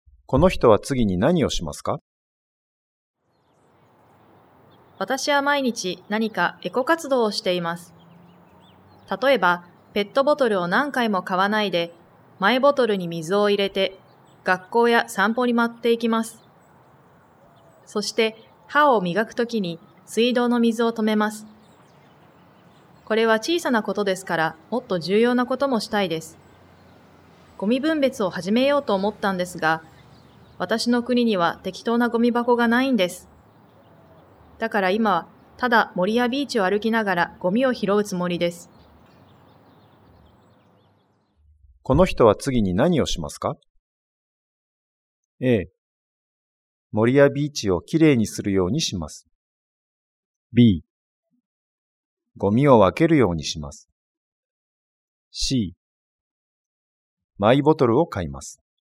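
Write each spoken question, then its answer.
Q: この人は次に何をしますか?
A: A: 森やビーチをきれいにするようにします。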